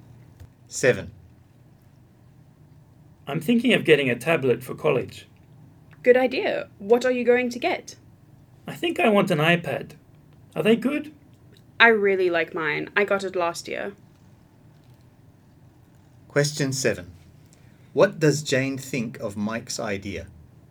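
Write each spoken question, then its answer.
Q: What does Jane think of Mike's idea?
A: She thinks it's a good idea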